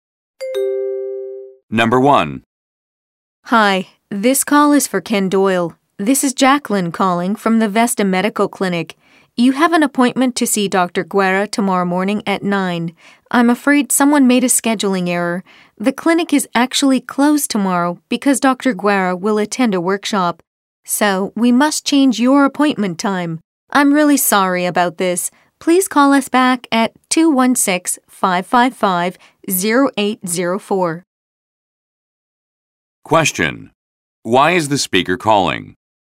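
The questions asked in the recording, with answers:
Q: Why is the speaker calling?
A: To reschedule Ken Doyle's appointment because the clinic will be closed tomorrow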